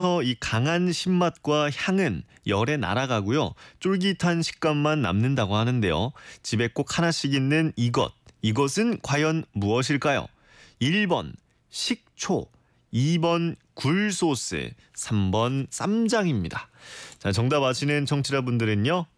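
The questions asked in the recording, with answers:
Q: 집에 꼭 하나씩 있는 이것. 이것은 과연 무엇일까요?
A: 1번: 식초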